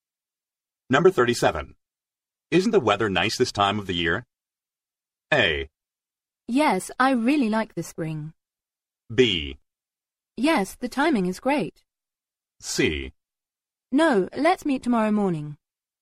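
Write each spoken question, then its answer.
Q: Isn't the weather nice this time of the year?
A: A: Yes, I really like the spring.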